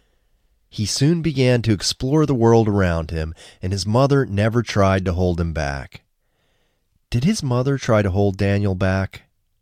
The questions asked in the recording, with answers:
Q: Did his mother try to hold Daniel back?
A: No, his mother didn't try to hold him back.